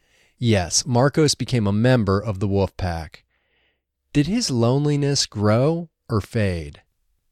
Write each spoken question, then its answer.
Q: Did his loneliness grow or fade?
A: His loneliness faded.